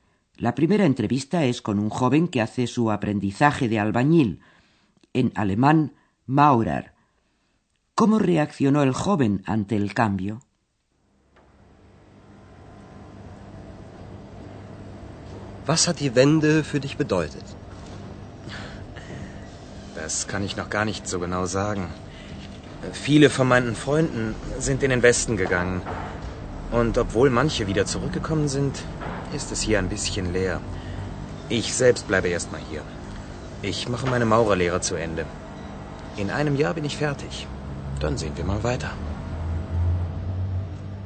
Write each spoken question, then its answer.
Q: ¿Cómo reaccionó el joven ante el cambio?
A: El joven todavía se siente inseguro.